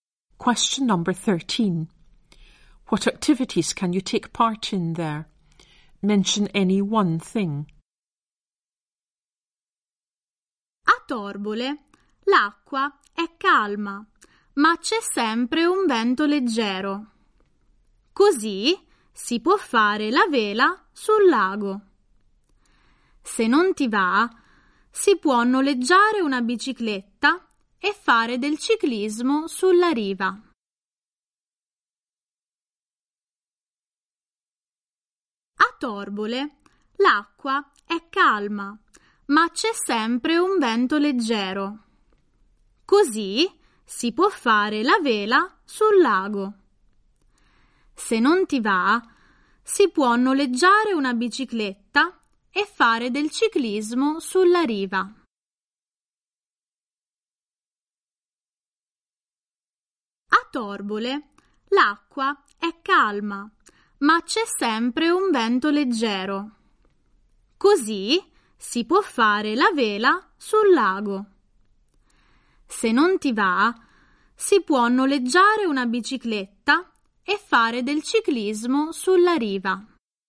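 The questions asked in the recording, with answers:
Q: What activities can you take part in there?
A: Sailing on the lake; hiring a bike and cycling along the shore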